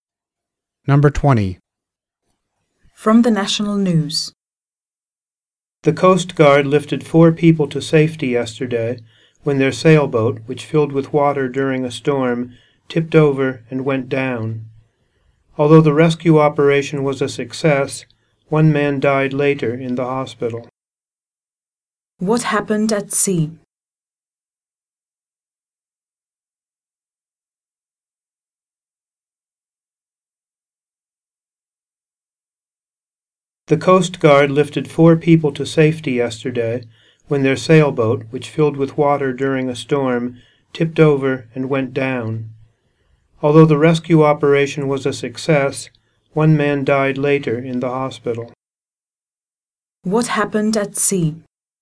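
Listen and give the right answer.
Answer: A sailboat filled with water in a storm, tipped over and sank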